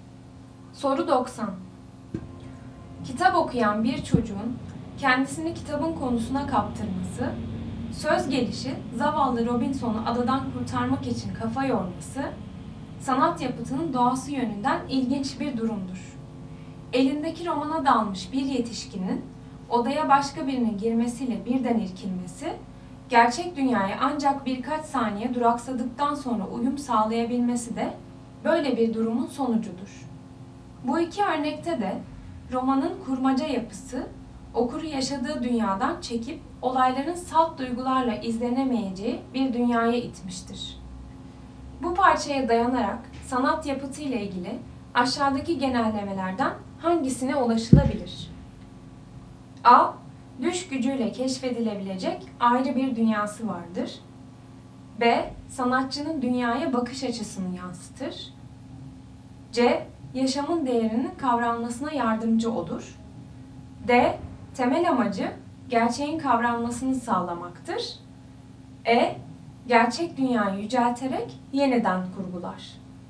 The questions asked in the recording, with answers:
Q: Bu parçaya dayanarak sanat yapıtı ile ilgili aşağıdaki genellemelerden hangisine ulaşılabilir?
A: Doğru cevap A. Düş gücüyle keşfedilebilecek ayrı bir dünyası vardır.